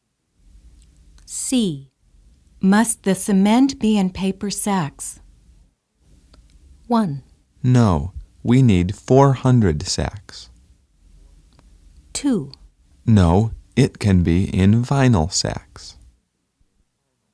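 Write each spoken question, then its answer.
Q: Must the cement be in paper sacks?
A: 2: No, it can be in vinyl sacks.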